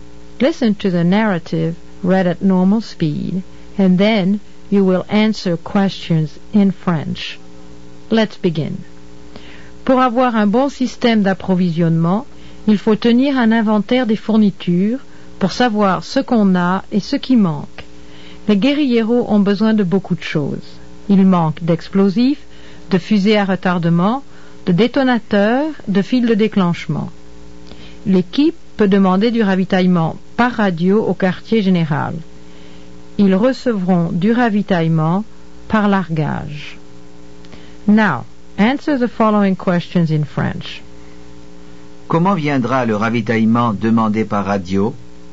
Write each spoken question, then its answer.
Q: Comment viendra le ravitaillement demandé par radio?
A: Il viendra par largage.